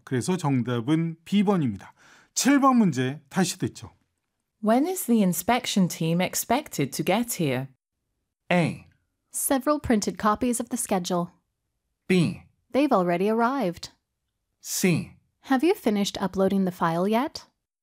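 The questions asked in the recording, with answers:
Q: When is the inspection team expected to get here?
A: B: They've already arrived.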